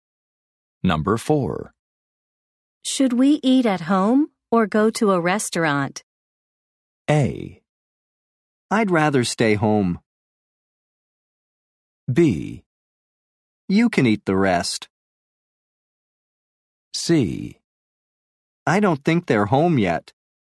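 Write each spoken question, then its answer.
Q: Should we eat at home or go to a restaurant?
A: A: I'd rather stay home.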